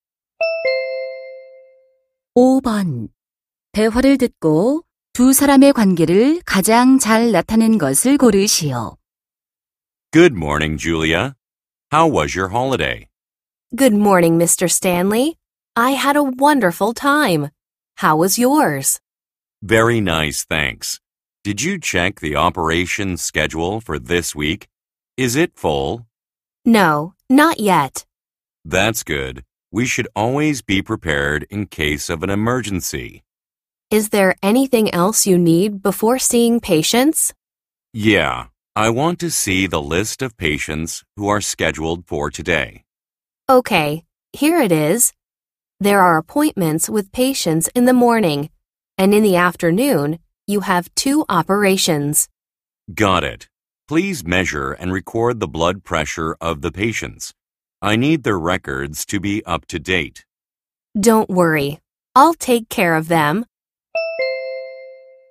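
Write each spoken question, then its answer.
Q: 대화를 듣고 두 사람의 관계를 가장 잘 나타낸 것을 고르시오.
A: 의사 - 간호사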